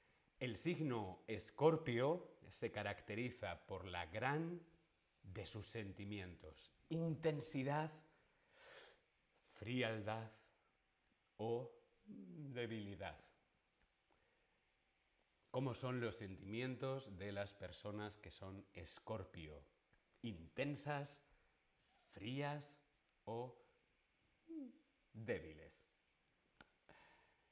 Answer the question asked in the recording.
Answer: Muy bien, intensidad, la intensidad de sus sentimientos.